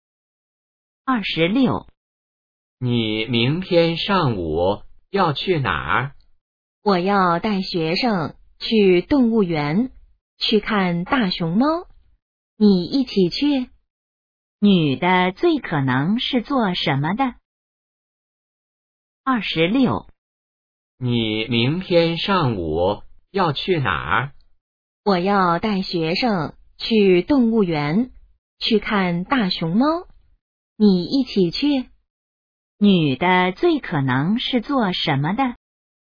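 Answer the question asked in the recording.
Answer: 老师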